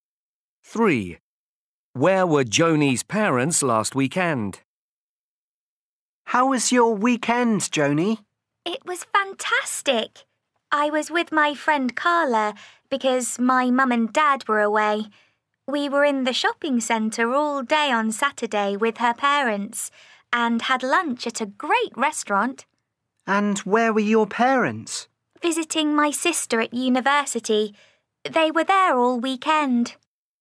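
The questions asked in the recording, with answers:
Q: Where were Joni's parents last weekend?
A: At university visiting her sister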